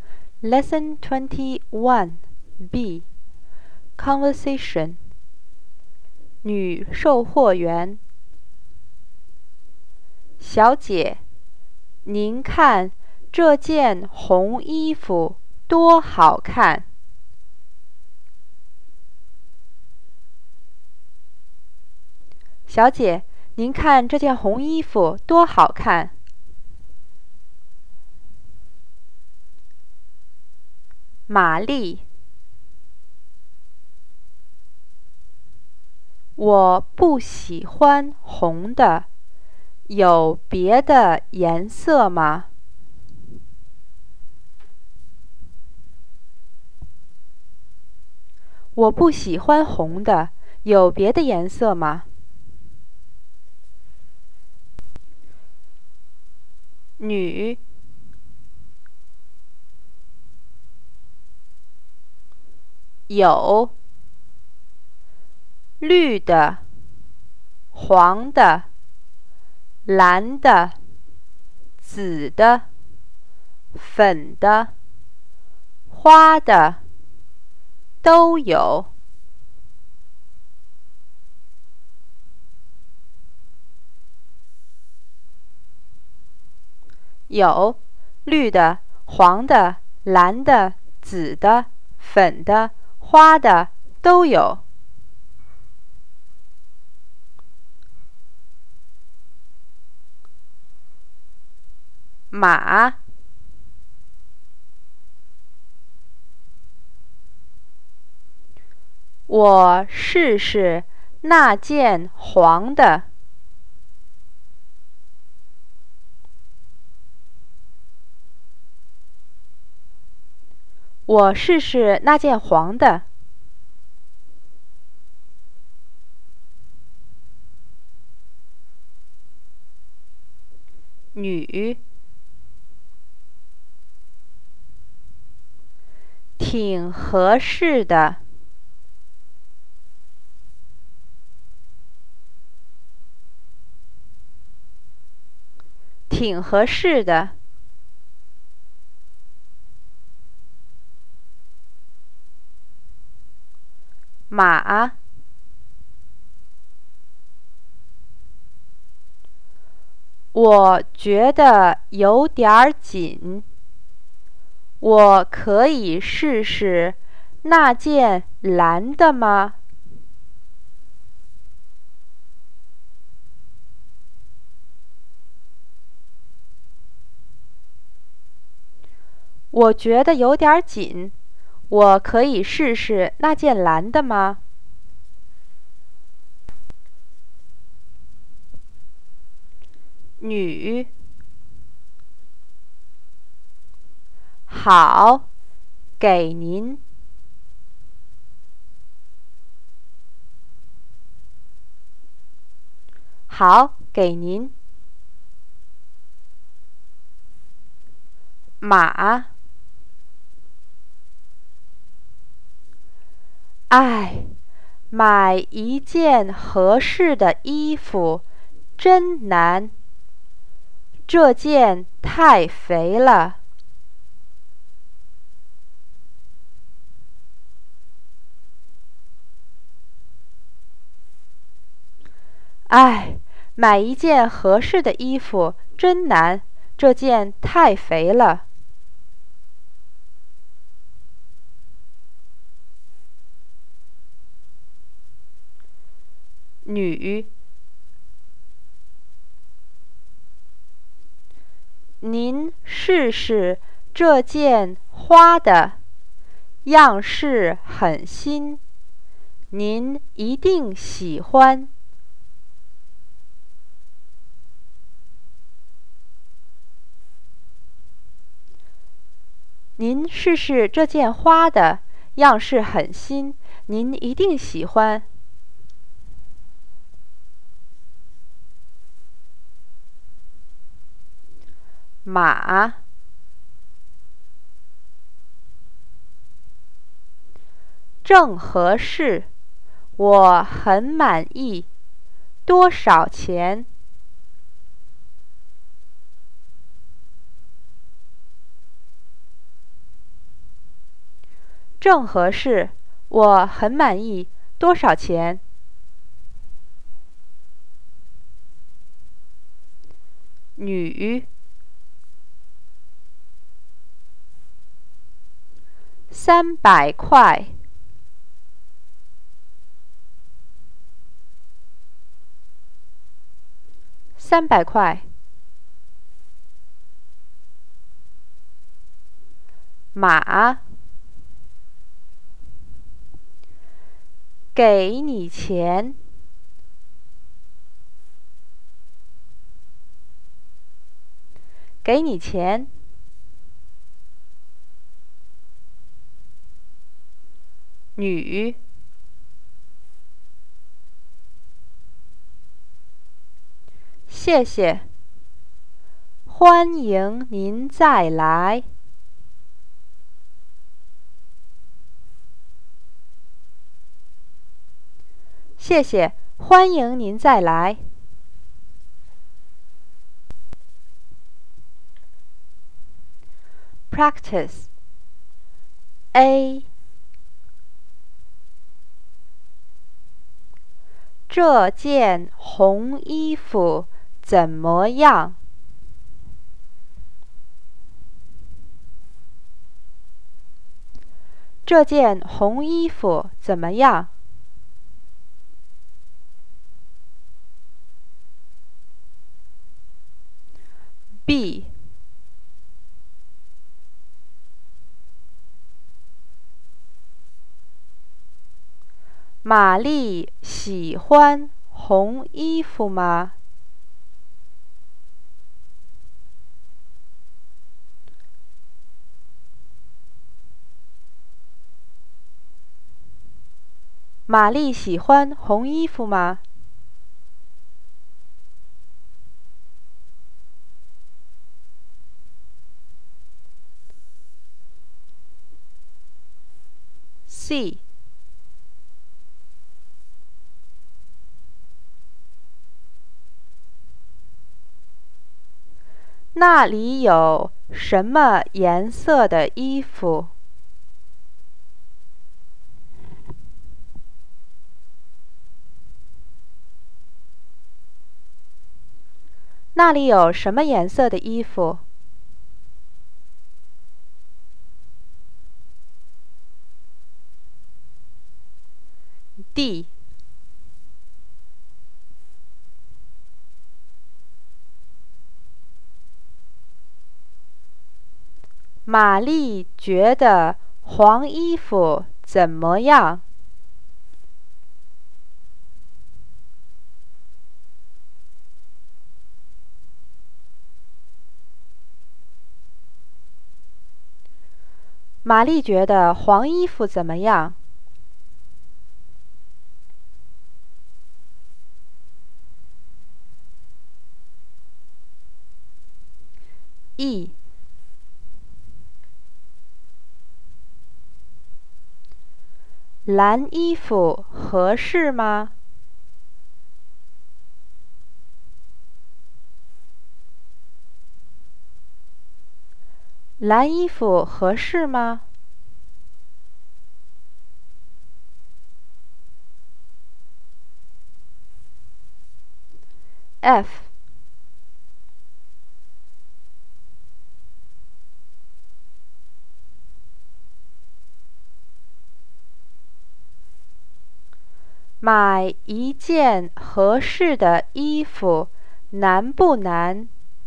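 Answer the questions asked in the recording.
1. 很好看
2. 不喜欢
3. 绿的、黄的、蓝的、紫的、粉的、花的
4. 有点紧
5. 不合适,太肥了
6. 真难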